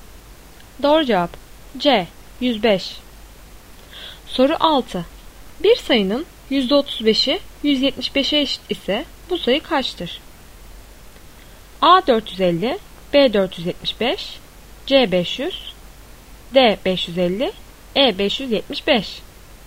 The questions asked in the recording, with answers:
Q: Bir sayının %35'i 175'e eşit ise bu sayı kaçtır?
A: Doğru cevap C 500.